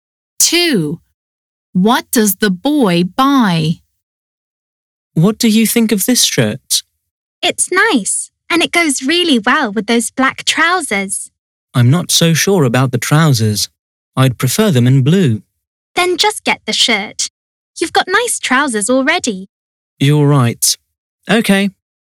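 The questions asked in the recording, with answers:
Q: What does the boy buy?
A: The shirt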